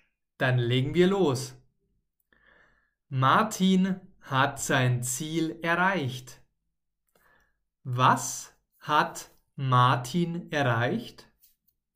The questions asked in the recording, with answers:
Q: Was hat Martin erreicht?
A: Sein Ziel natürlich.